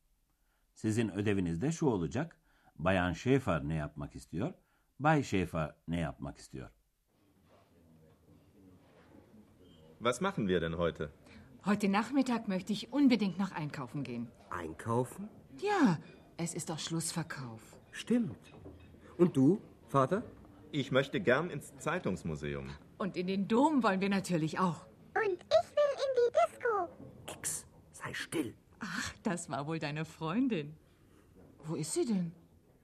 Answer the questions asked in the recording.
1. Bayan Schäfer alışverişe gitmek istiyordu.
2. Bay Schäfer ise müzeye gitmek istiyor.